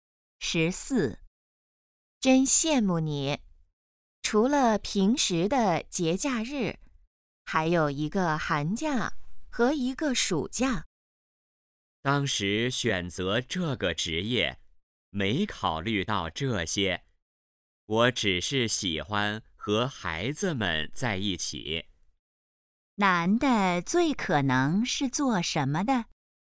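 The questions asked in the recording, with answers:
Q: 男的最可能是做什么的?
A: 老师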